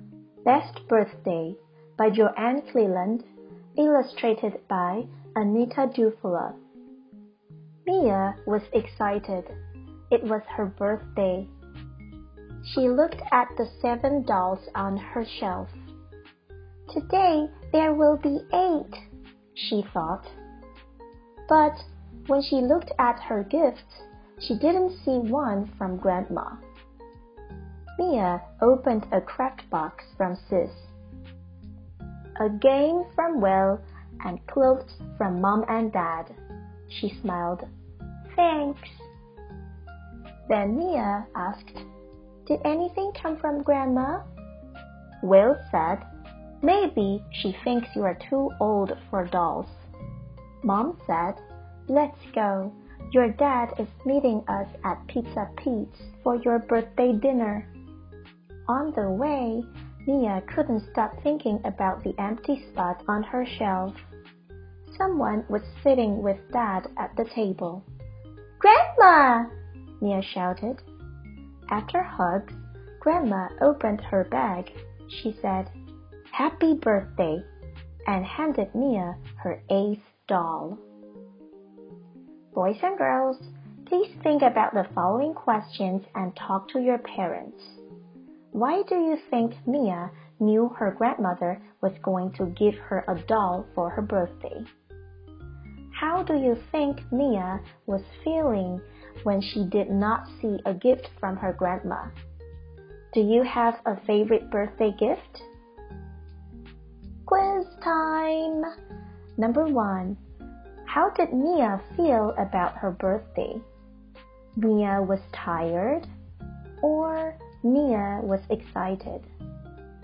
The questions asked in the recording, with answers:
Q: How did Mia feel about her birthday?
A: The answer is Mia was excited.